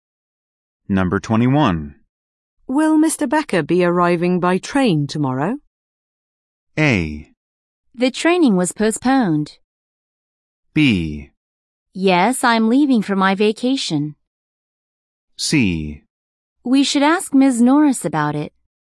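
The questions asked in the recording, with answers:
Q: Will Mr. Becker be arriving by train tomorrow?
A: C: We should ask Ms. Norris about it.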